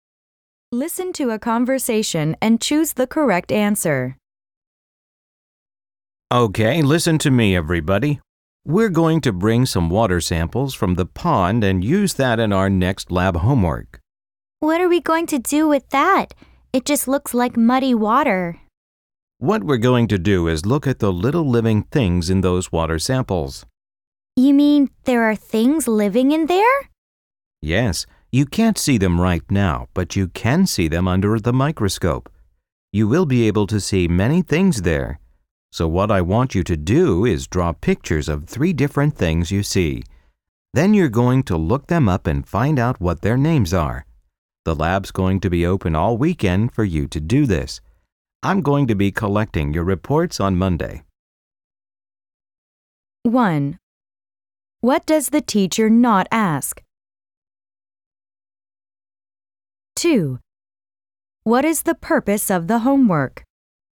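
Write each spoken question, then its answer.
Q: What is the purpose of the homework?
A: To observe tiny living things in pond water under a microscope and find out their names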